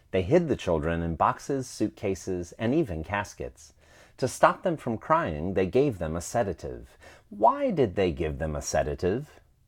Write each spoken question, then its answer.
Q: Why did they give them a sedative?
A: They gave them a sedative to stop them from crying.